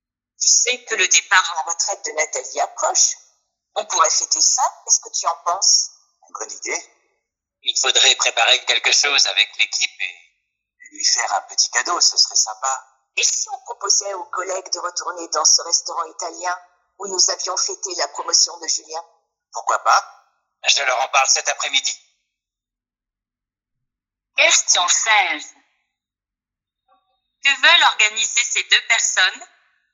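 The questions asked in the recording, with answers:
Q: Que veulent organiser ces deux personnes?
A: Une fête (un repas au restaurant italien) pour le départ à la retraite de Nathalie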